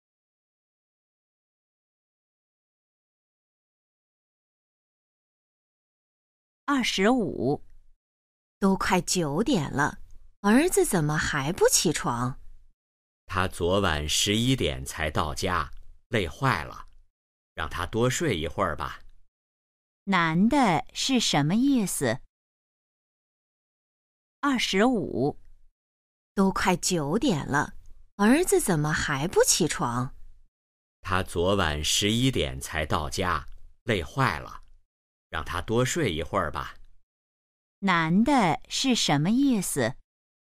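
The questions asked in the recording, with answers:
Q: 男的是什么意思?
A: 让儿子多睡一会儿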